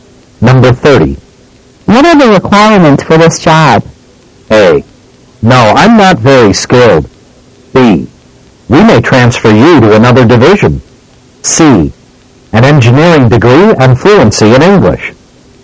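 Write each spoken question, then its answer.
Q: What are the requirements for this job?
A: C: An engineering degree and fluency in English.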